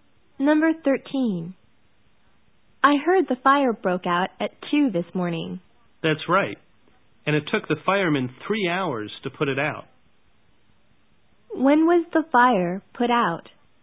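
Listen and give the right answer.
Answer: At 5 in the morning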